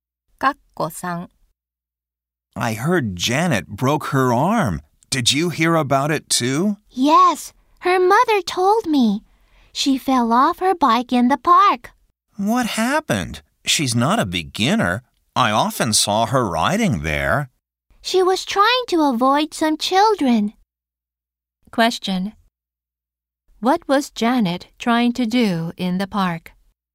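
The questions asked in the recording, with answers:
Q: What was Janet trying to do in the park?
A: Avoid some children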